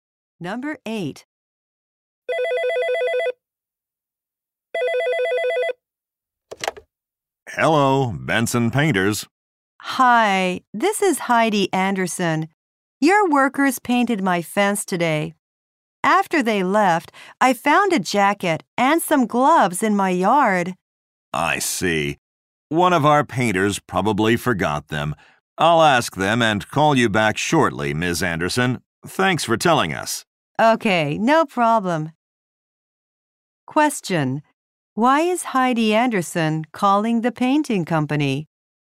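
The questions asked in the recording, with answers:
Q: Why is Heidi Anderson calling the painting company?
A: The workers left a jacket and gloves in her yard.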